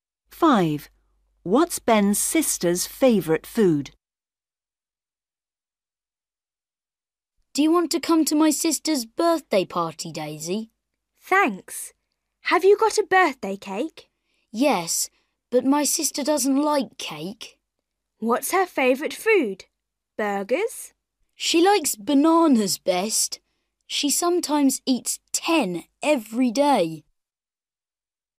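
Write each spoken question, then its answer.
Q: What's Ben's sister's favourite food?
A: bananas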